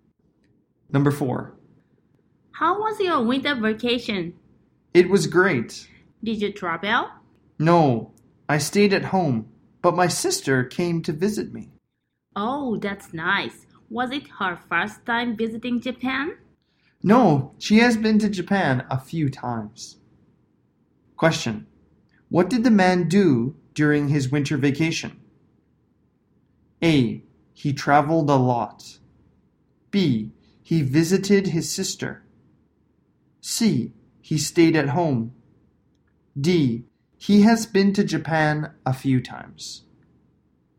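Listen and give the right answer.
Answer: C: He stayed at home.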